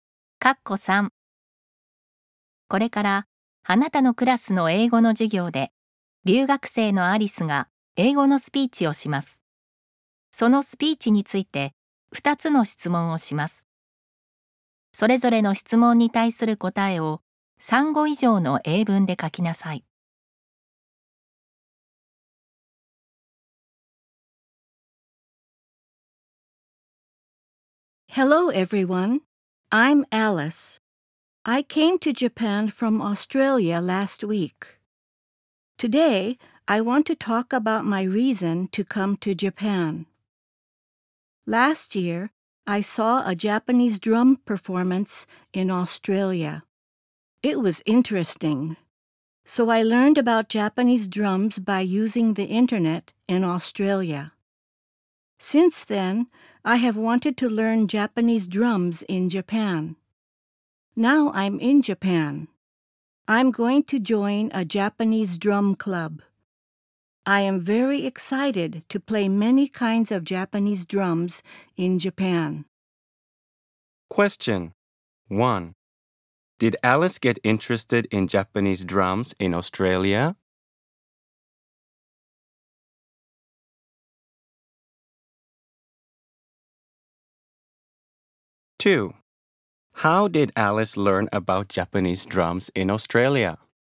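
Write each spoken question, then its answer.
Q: Did Alice get interested in Japanese drums in Australia?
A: Yes, she did.

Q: How did Alice learn about Japanese drums in Australia?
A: She learned about them by using the internet.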